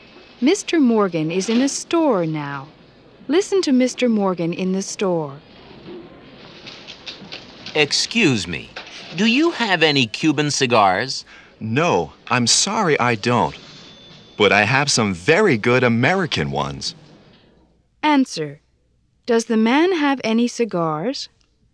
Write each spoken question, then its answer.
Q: Answer. Does the man have any cigars?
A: Yes, he does.